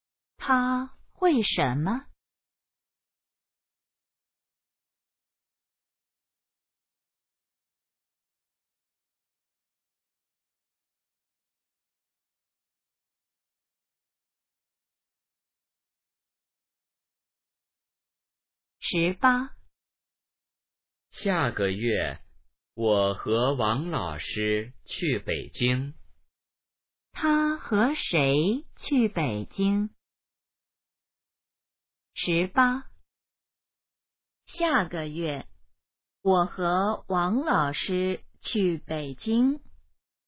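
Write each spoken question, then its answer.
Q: 他和谁去北京?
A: 王老师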